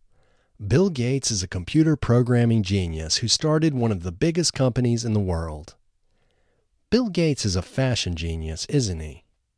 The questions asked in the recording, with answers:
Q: Bill Gates is a fashion genius, isn't he?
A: No, Bill Gates isn't a fashion genius.